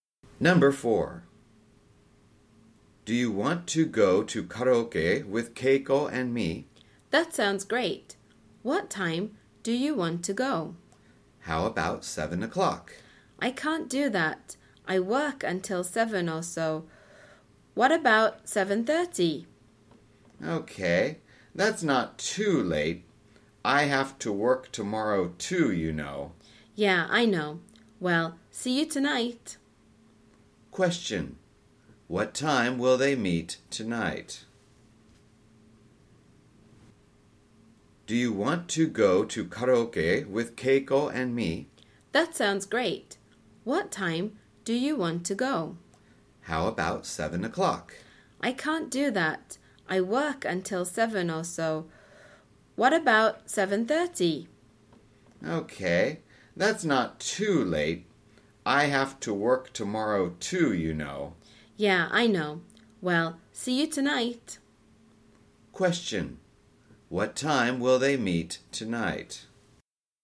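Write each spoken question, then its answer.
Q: What time will they meet tonight?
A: 7:30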